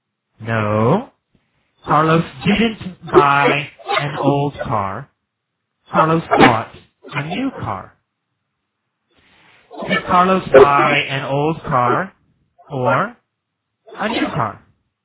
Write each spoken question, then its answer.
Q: Did Carlos buy an old car or a new car?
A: A new car. Carlos bought a new car.